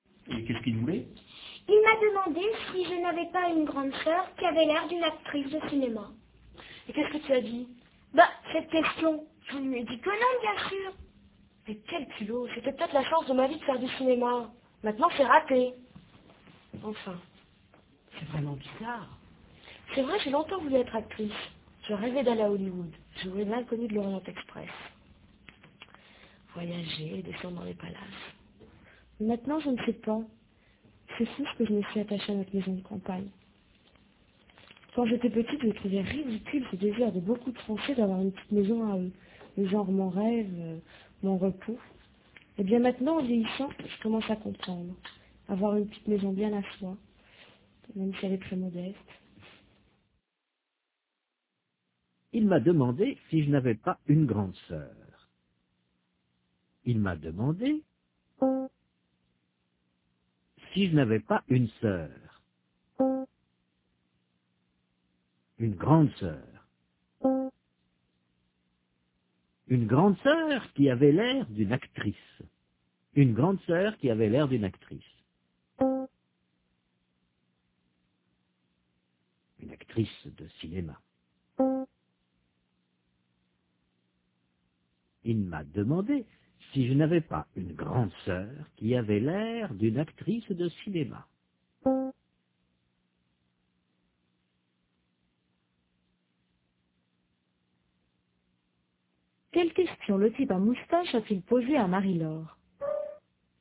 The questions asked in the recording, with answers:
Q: Quelle question le type à moustache a-t-il posée à Marie-Laure?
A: Il lui a demandé si elle n'avait pas une grande sœur qui avait l'air d'une actrice de cinéma.